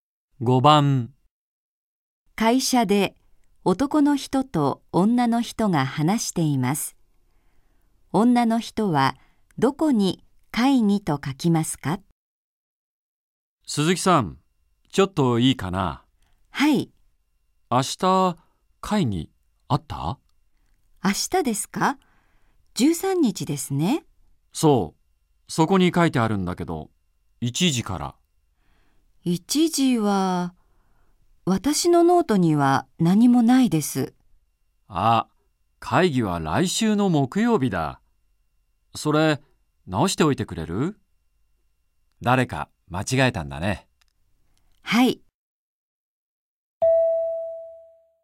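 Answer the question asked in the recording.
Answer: 来週の木曜日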